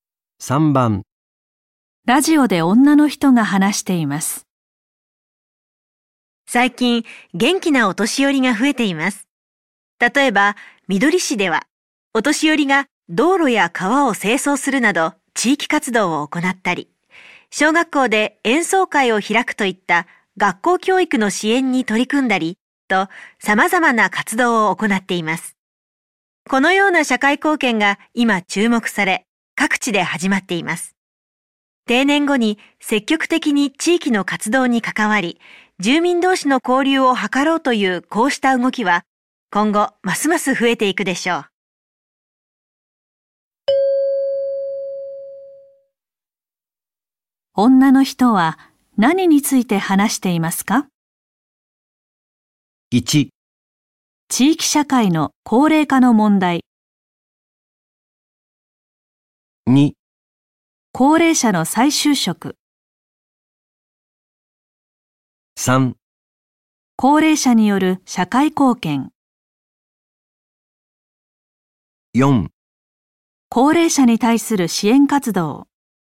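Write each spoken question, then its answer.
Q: 女の人は何について話していますか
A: 3: 高齢者による社会貢献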